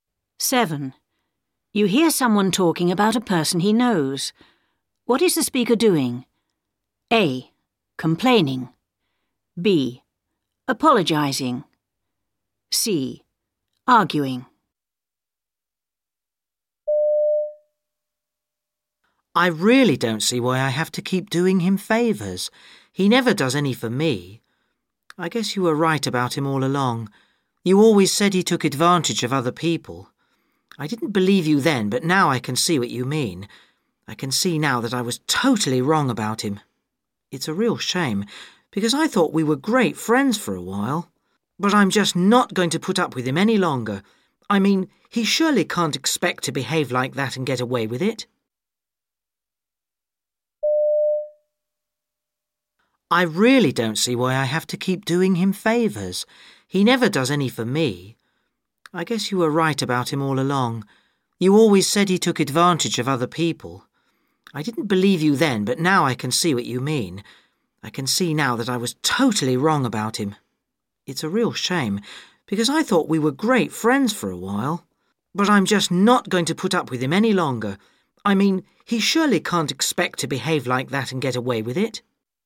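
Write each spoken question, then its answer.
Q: What is the speaker doing?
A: A: Complaining.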